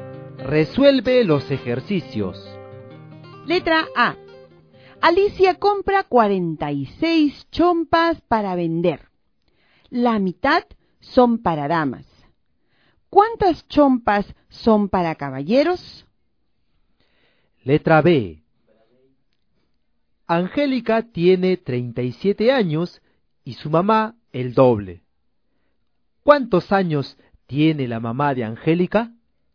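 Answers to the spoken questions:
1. 23 chompas
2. 74 años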